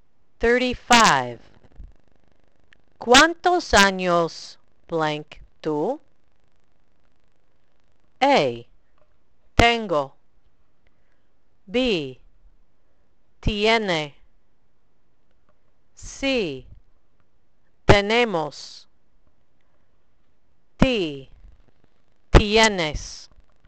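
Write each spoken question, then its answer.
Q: ¿Cuántos años blank tú?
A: D: Tienes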